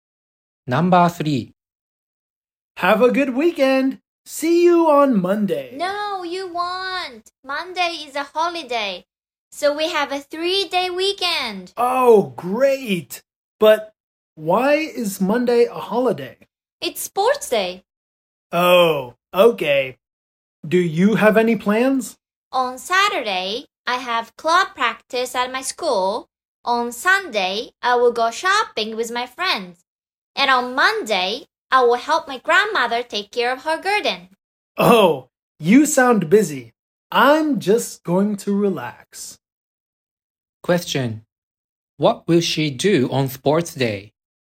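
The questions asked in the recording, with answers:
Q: What will she do on sports day?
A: Help her grandmother take care of her garden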